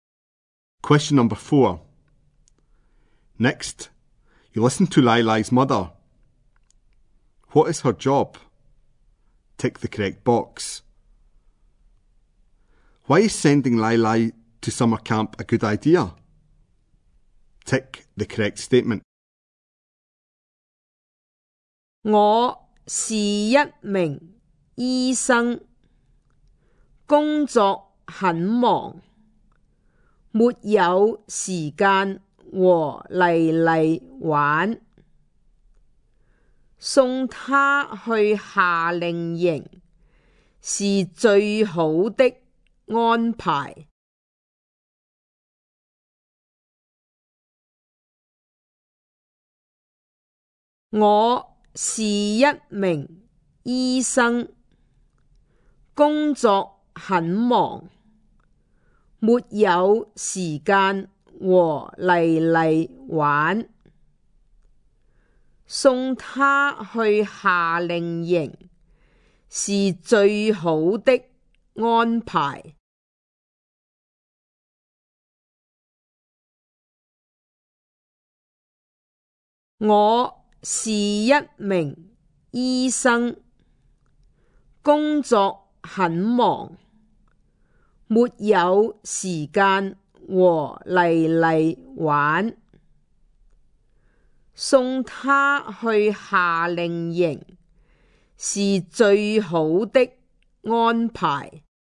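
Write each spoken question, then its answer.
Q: What is her job?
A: Doctor

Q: Why is sending Lai Lai to summer camp a good idea?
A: She is busy at work and has no time to play with Lai Lai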